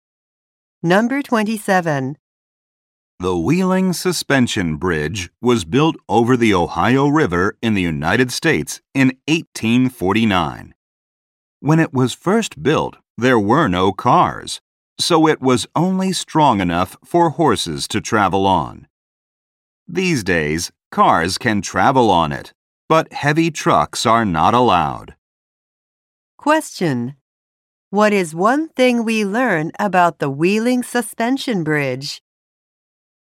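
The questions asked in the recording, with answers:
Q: What is one thing we learn about the Wheeling Suspension Bridge?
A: Heavy trucks are not allowed on it.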